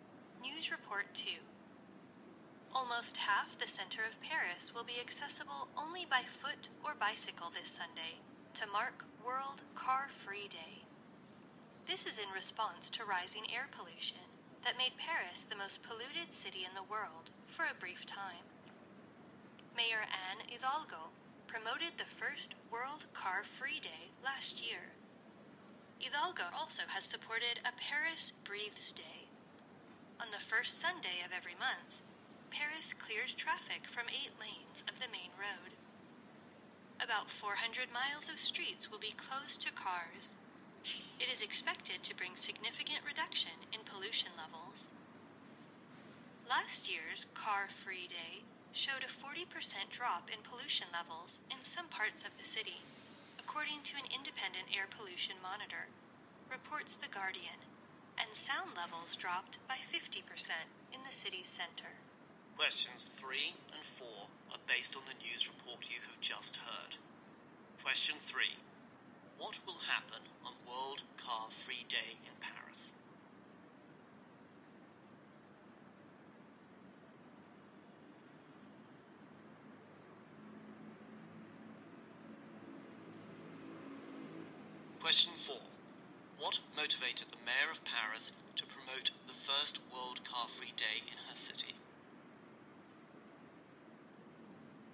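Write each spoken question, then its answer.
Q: What will happen on World Car-Free Day in Paris?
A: Almost half the city centre will be open only to walkers and cyclists.

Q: What motivated the mayor of Paris to promote the first World Car-Free Day in her city?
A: Rising air pollution.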